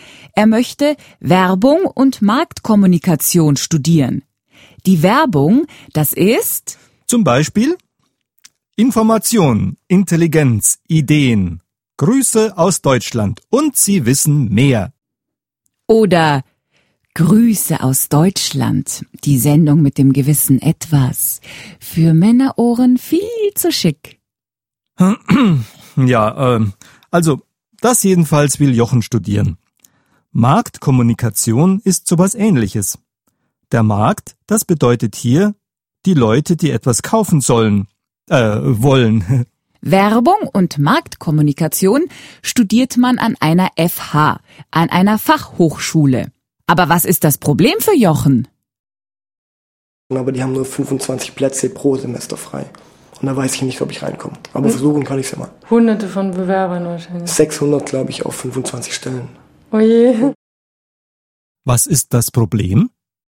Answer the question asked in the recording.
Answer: Es gibt nicht genug Plätze pro Semester.